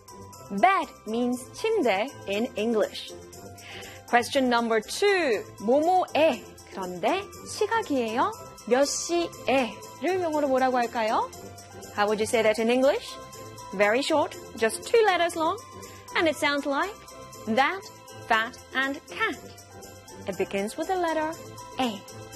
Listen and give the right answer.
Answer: 몇 시에 in English is, of course, A-T, at.